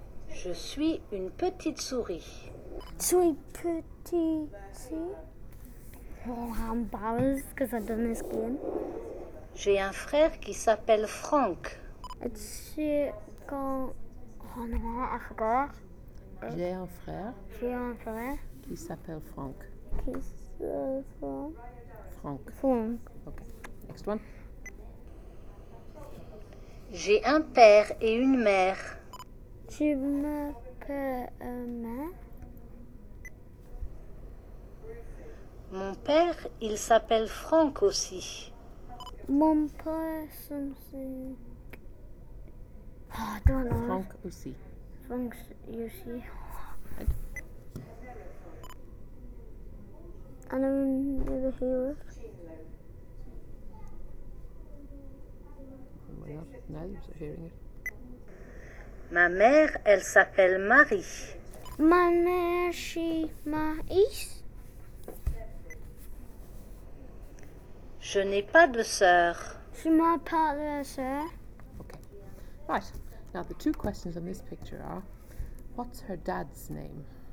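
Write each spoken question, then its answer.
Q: what's her dad's name?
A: Frank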